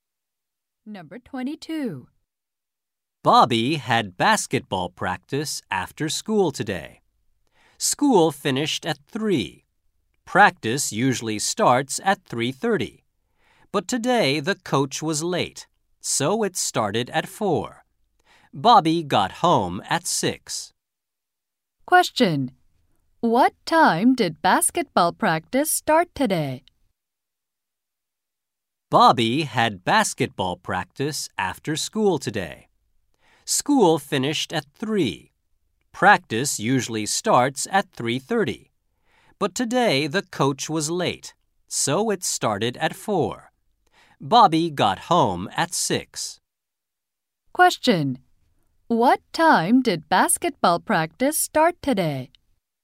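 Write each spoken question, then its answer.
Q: What time did basketball practice start today?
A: At 4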